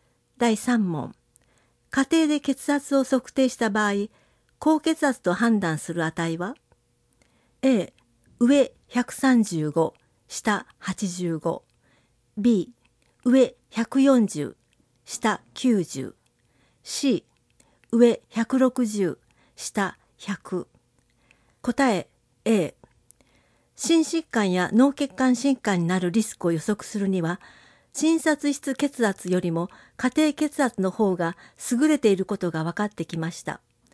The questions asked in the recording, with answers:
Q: 家庭で血圧を測定した場合、高血圧と判断する値は?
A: 答え A.